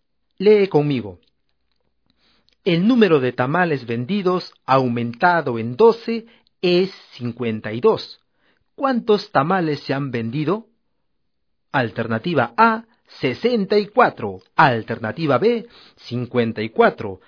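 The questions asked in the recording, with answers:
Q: ¿Cuántos tamales se han vendido?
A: C: 40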